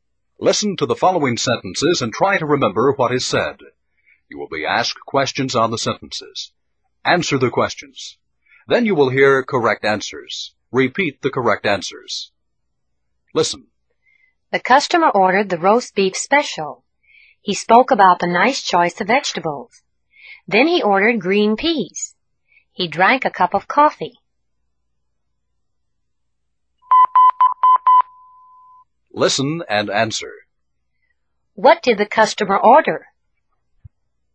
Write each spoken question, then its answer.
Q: What did the customer order?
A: The roast beef special. He ordered the roast beef special.